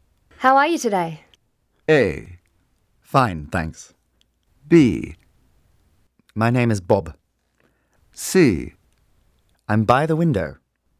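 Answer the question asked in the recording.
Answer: A: Fine, thanks.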